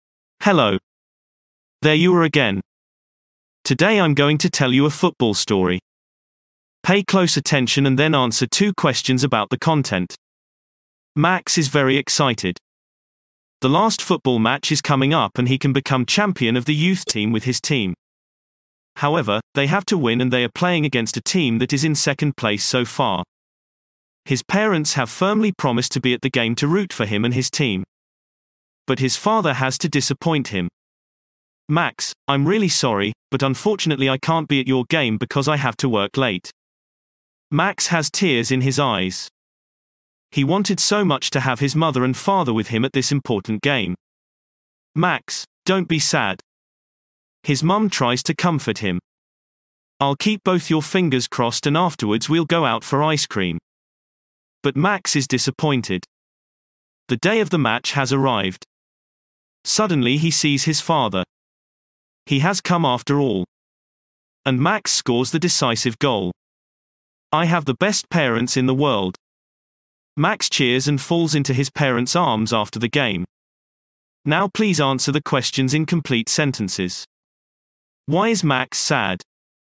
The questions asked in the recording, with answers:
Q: Why is Max sad?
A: Max is sad because his father can't come to his football match.